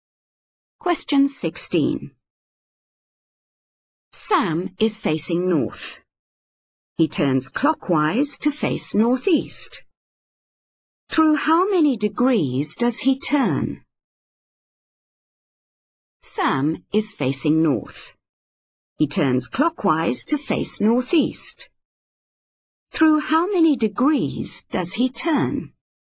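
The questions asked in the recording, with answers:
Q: Through how many degrees does he turn?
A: 45 degrees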